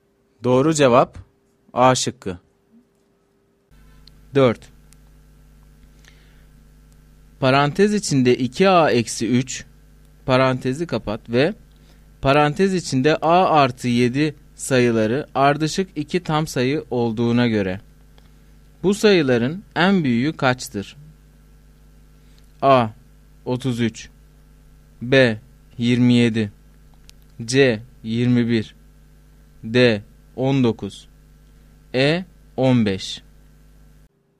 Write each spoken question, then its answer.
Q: Parantez içinde 2A eksi 3, parantezi kapat ve parantez içinde A artı 7 sayıları ardışık 2 tam sayı olduğuna göre bu sayıların en büyüğü kaçtır?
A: Doğru cevap D şıkkı.